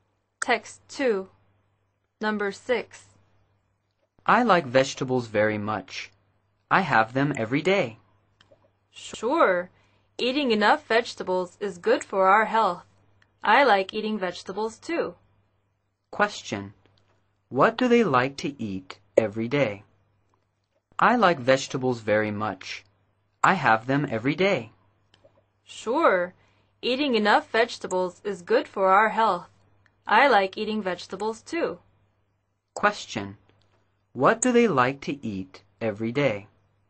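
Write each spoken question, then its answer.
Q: Question, what do they like to eat every day?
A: Vegetables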